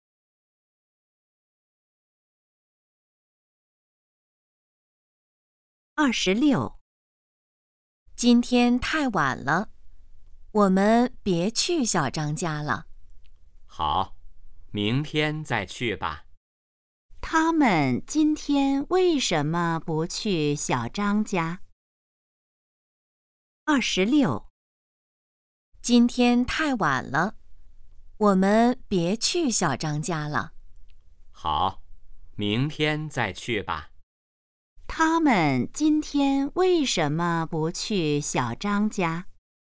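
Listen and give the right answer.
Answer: 今天太晚了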